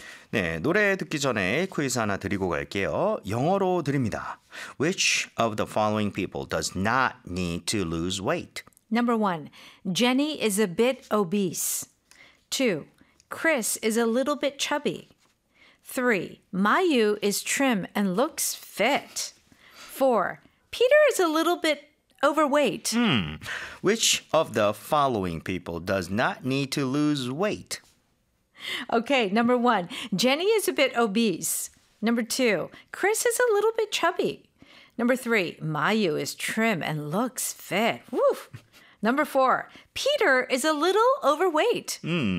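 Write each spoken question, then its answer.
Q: Which of the following people does not need to lose weight?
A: 3: Mayu is trim and looks fit.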